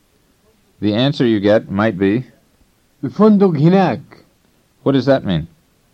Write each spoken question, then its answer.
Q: What does that mean?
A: It means the hotel is over there.